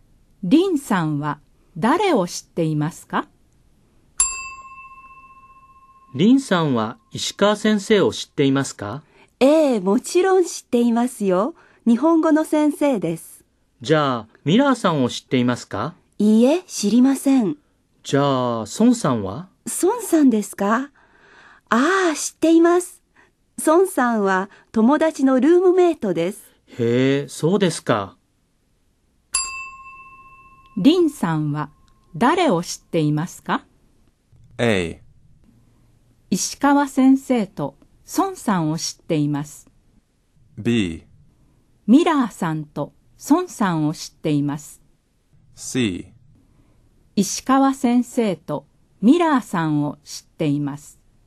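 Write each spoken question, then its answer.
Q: リンさんは誰を知っていますか?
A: A: 石川先生と孫さんを知っています。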